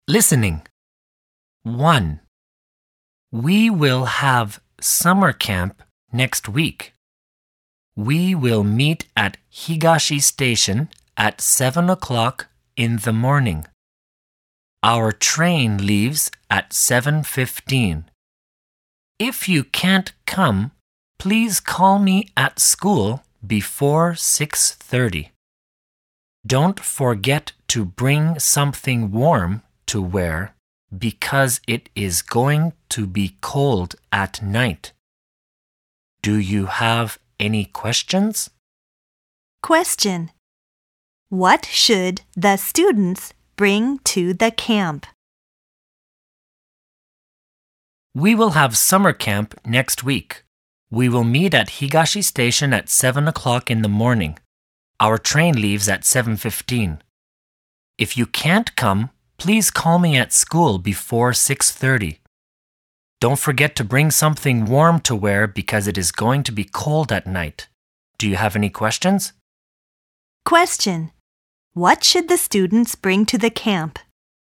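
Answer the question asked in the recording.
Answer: Something warm to wear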